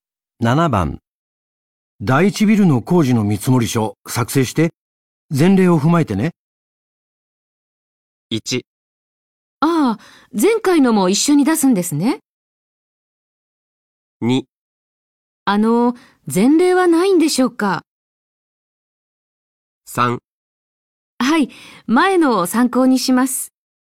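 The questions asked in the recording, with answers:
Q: 第一ビルの工事の見積書作成して前例を踏まえてね。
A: 3: はい、前のを参考にします。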